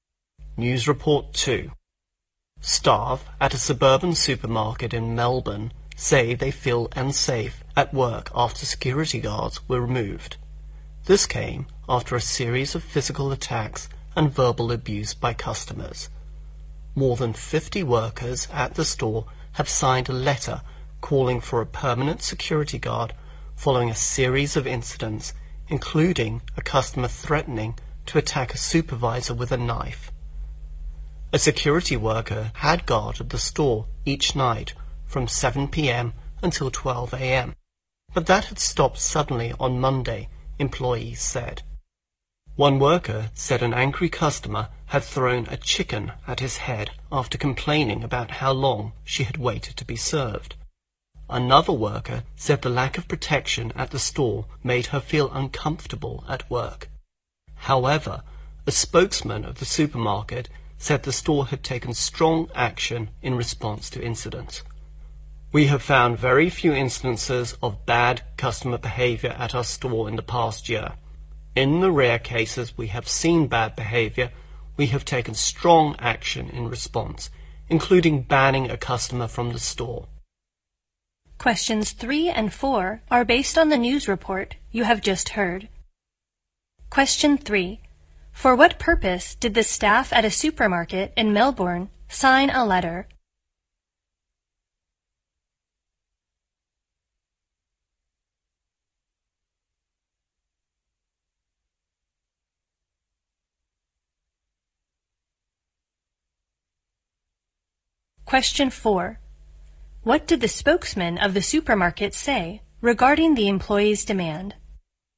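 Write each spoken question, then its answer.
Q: For what purpose did the staff at a supermarket in Melbourne sign a letter?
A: To call for a permanent security guard

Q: What did the spokesman of the supermarket say regarding the employee's demand?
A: The store had taken strong action in response to incidents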